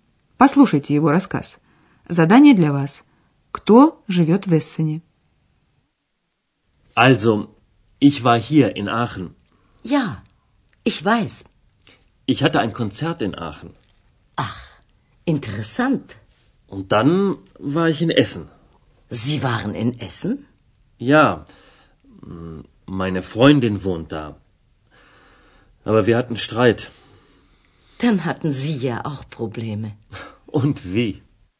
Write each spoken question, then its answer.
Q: Кто живет в Эссене?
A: Да, в Эссене живет подруга господина Майера.